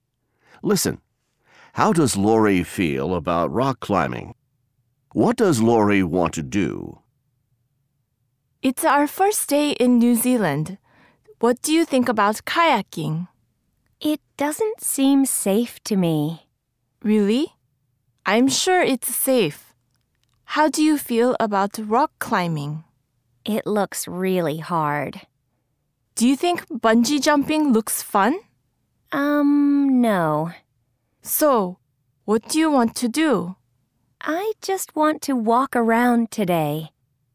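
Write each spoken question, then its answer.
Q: How does Lori feel about rock climbing?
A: She thinks it looks really hard.

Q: What does Lori want to do?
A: She just wants to walk around today.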